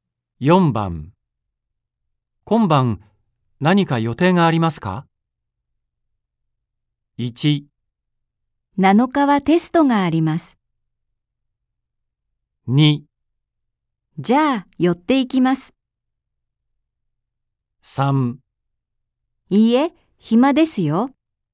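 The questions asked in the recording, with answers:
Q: 今晩何か予定がありますか?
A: 3: いいえ、暇ですよ。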